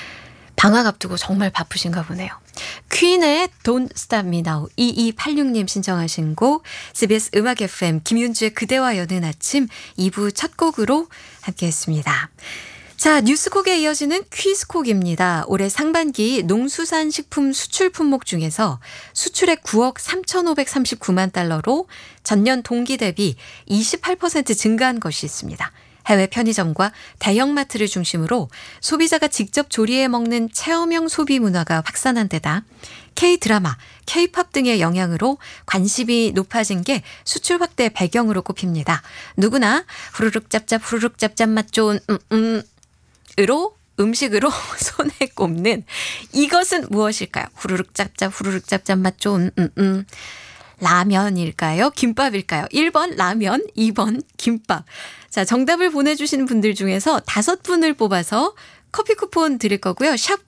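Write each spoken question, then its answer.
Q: 누구나 후루룩짭짭 후루룩짭짭 맛 좋은 음식으로 손에 꼽는 이것은 무엇일까요?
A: 1번: 라면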